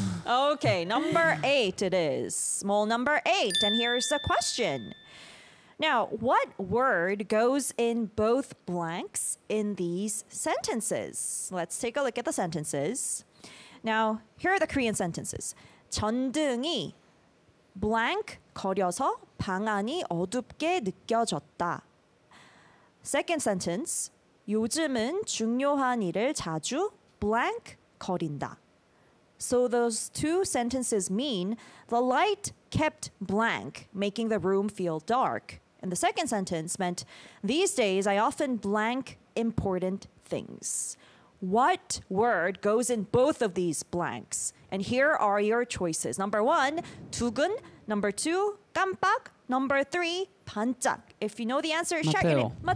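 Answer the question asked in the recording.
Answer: 2: 깜빡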